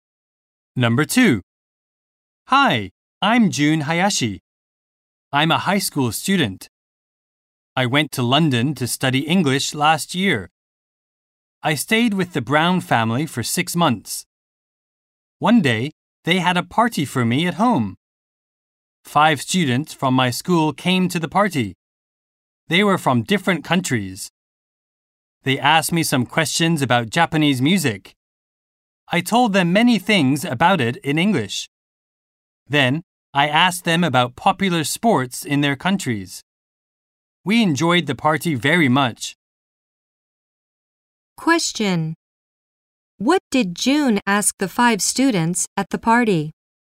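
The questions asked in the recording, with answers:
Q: What did June ask the 5 students at the party?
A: About popular sports in their countries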